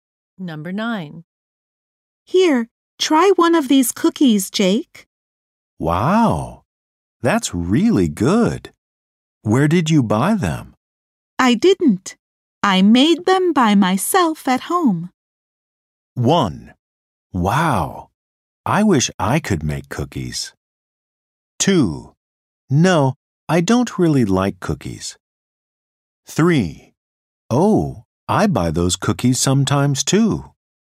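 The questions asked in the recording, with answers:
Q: I didn't. I made them by myself at home.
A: 1: Wow, I wish I could make cookies.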